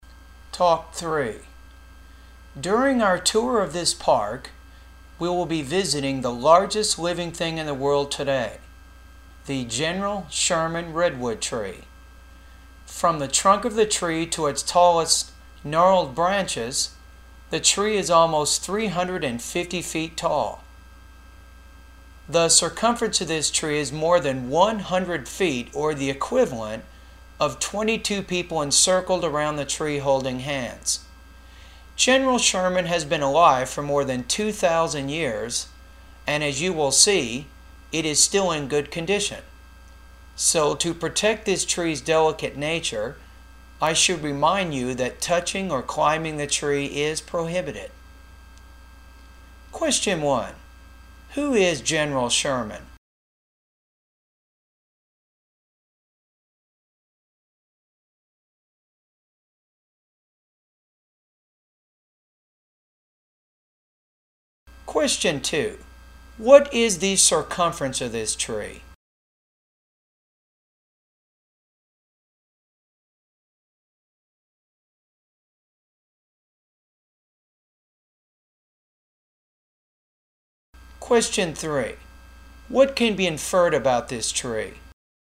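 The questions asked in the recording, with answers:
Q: Who is General Sherman?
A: A giant redwood tree, the largest living thing in the world

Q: What is the circumference of this tree?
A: More than 100 feet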